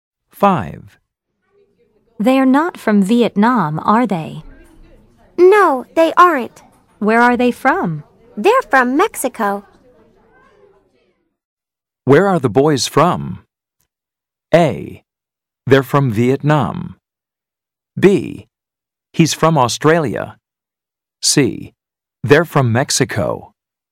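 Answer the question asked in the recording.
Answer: C: They're from Mexico.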